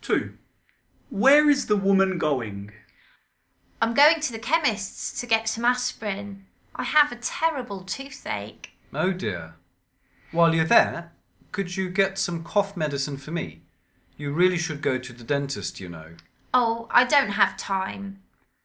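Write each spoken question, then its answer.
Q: Where is the woman going?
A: To the chemist's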